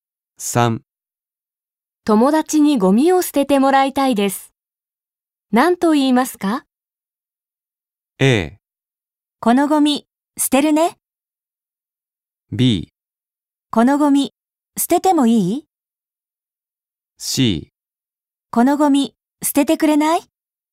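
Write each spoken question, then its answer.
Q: 友達にゴミを捨ててもらいたいです。何と言いますか?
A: C: このゴミ捨ててくれない?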